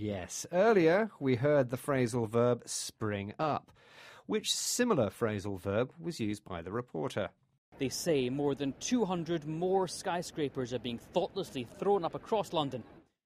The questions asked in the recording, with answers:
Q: Which similar phrasal verb was used by the reporter?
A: Thrown up.